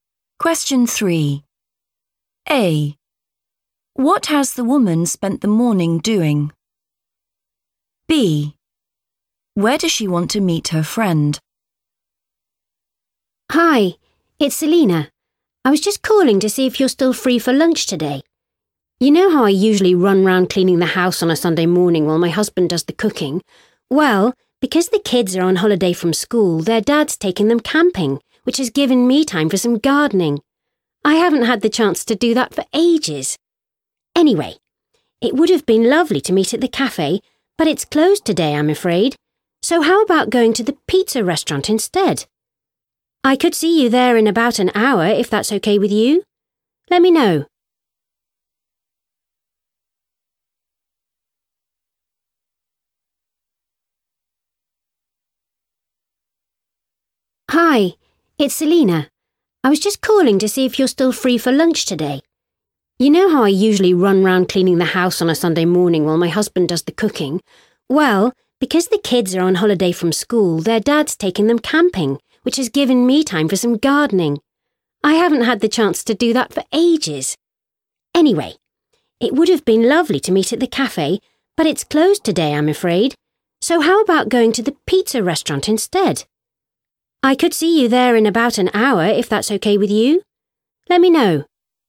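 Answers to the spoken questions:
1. gardening
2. the pizza restaurant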